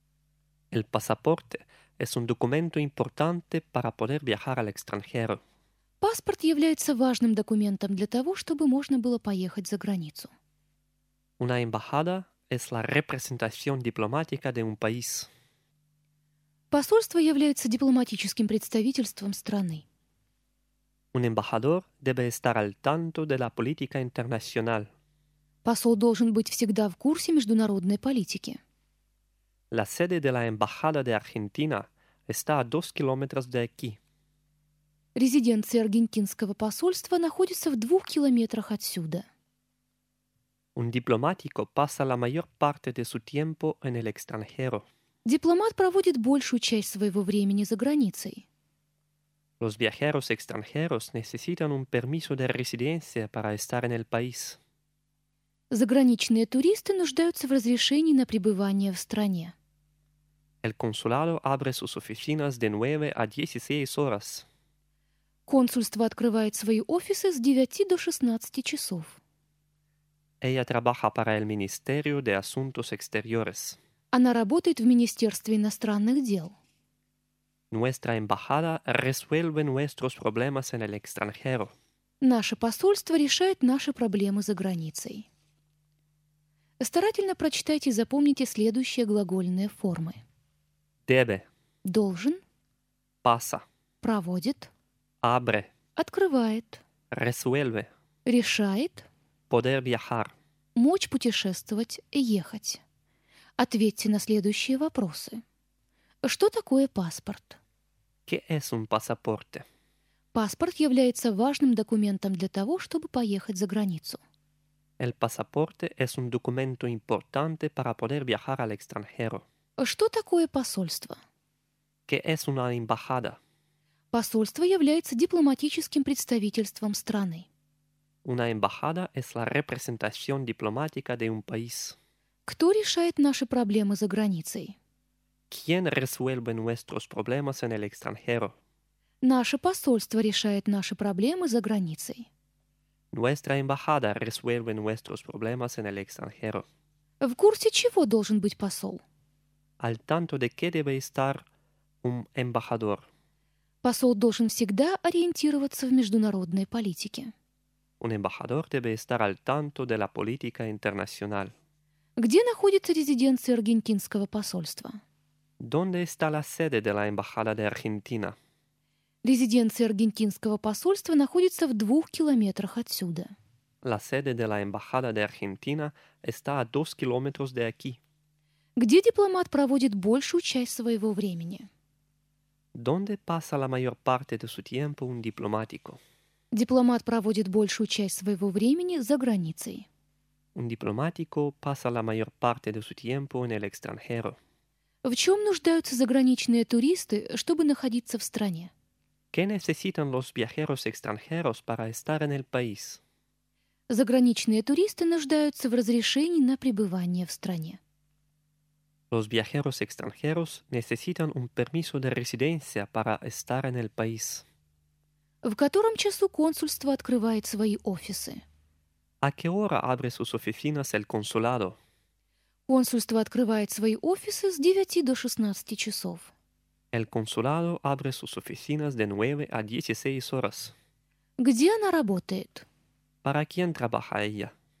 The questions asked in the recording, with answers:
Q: ¿Qué es un pasaporte?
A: El pasaporte es un documento importante para poder viajar al extranjero.

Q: ¿Qué es una embajada?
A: Una embajada es la representación diplomática de un país.

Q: ¿Quién resuelve nuestros problemas en el extranjero?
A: Nuestra embajada resuelve nuestros problemas en el extranjero.

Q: Al tanto de qué debe estar un embajador.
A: Un embajador debe estar al tanto de la política internacional.

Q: ¿Dónde está la sede de la embajada de Argentina?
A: La sede de la embajada de Argentina está a 2 kilómetros de aquí.

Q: ¿Dónde pasa la mayor parte de su tiempo un diplomático?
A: Un diplomático pasa la mayor parte de su tiempo en el extranjero.

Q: ¿Qué necesitan los viajeros extranjeros para estar en el país?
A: Los viajeros extranjeros necesitan un permiso de residencia para estar en el país.

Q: ¿A qué hora abre sus oficinas el consulado?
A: El consulado abre sus oficinas de 9 a 16 horas.

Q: ¿Para quién trabaja ella?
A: Ella trabaja para el Ministerio de Asuntos Exteriores.